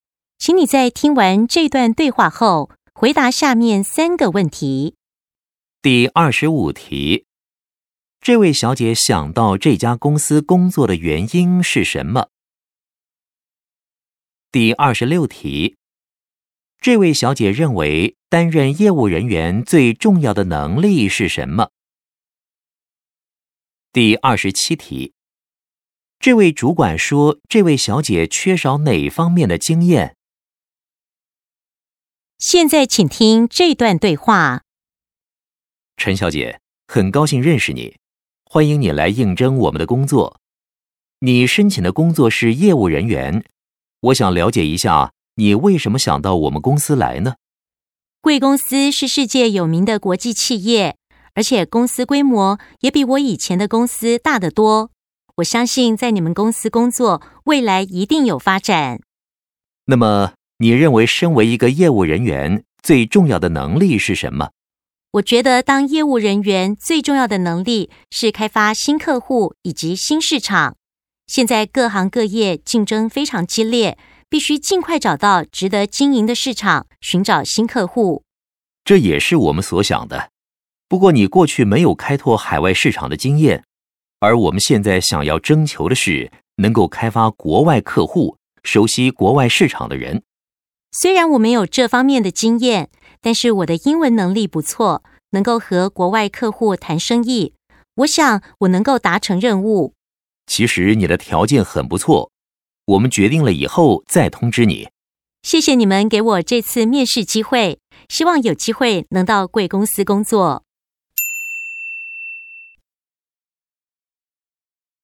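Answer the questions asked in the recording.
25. 公司是世界有名的国际企业,规模大,未来有发展
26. 开发新客户以及新市场
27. 开拓海外市场的经验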